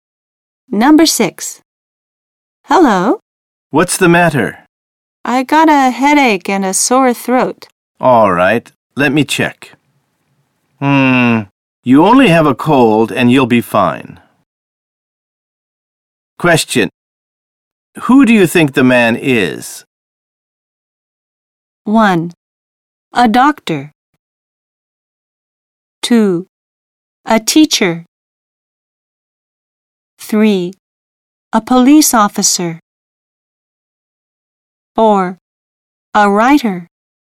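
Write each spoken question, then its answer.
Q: Who do you think the man is?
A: 1: A doctor.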